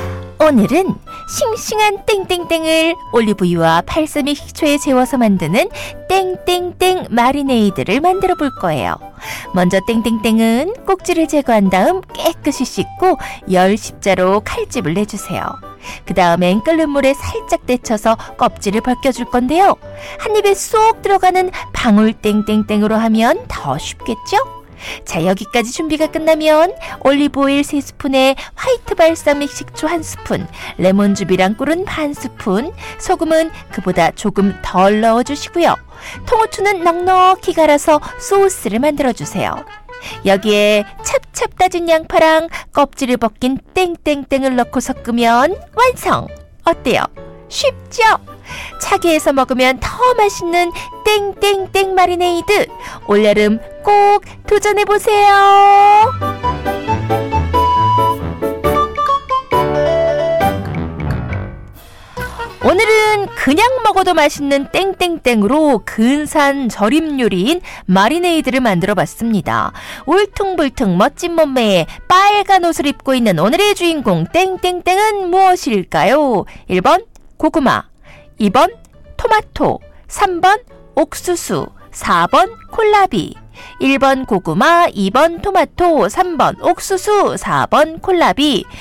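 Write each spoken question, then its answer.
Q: 울퉁불퉁 멋진 몸매에 빨간 옷을 입고 있는 오늘의 주인공 땡땡땡은 무엇일까요?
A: 2번: 토마토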